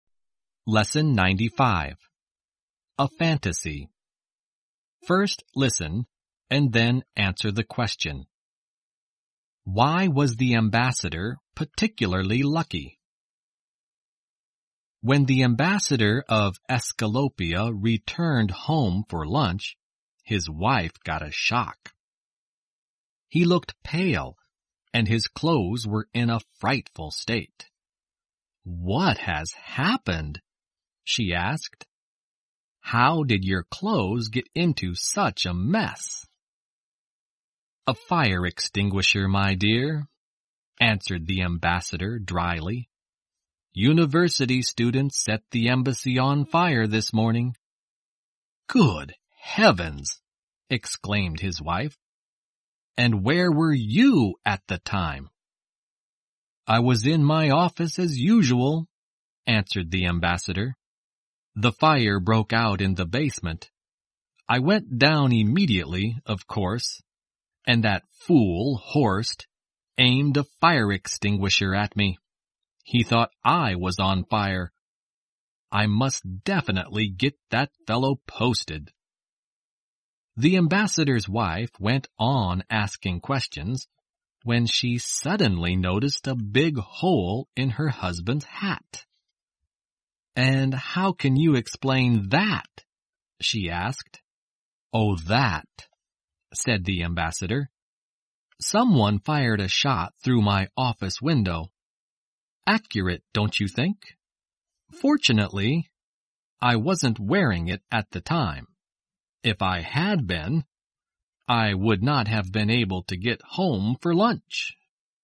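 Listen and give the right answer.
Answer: He wasn't wearing his hat when someone fired a shot through it, so he wasn't hurt.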